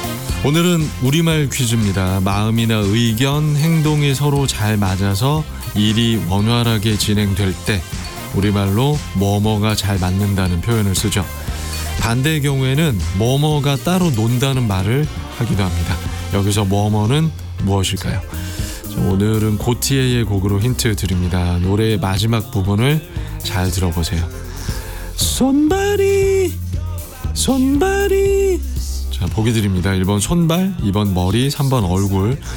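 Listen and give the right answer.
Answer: 1: 손발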